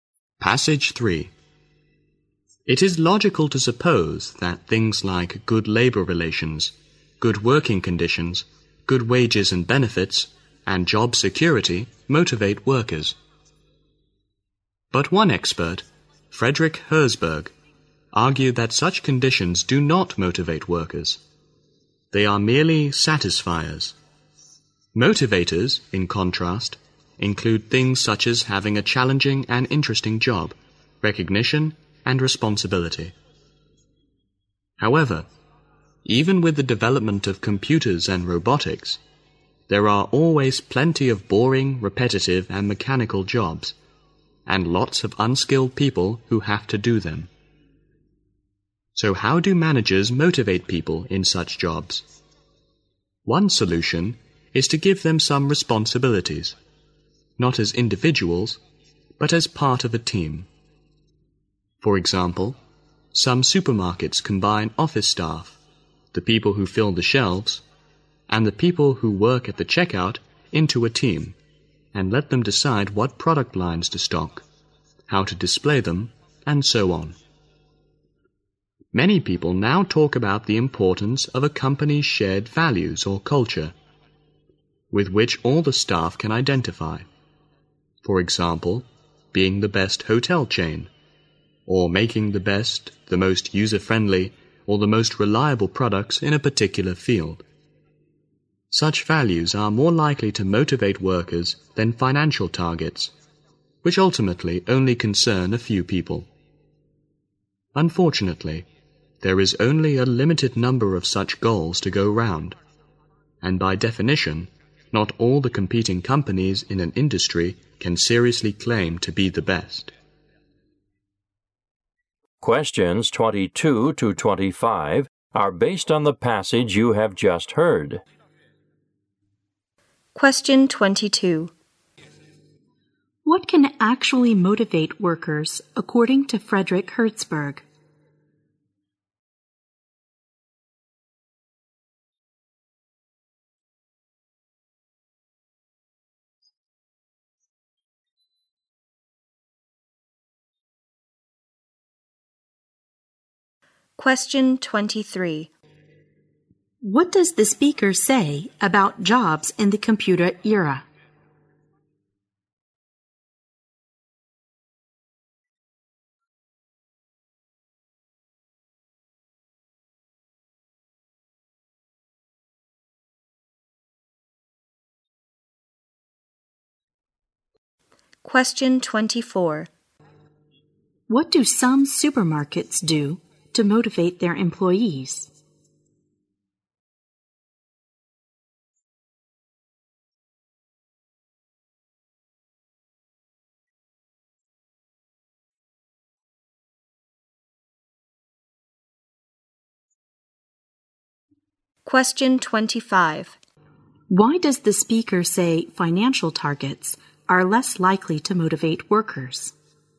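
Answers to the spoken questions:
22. A challenging, interesting job, recognition and responsibility
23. There are still plenty of boring, repetitive, mechanical jobs
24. Combine staff into teams and let them decide what to stock and how to display it
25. They ultimately concern only a few people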